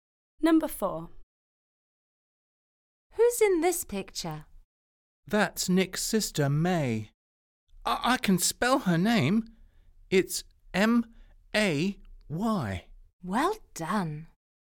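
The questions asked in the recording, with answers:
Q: Who's in this picture?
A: May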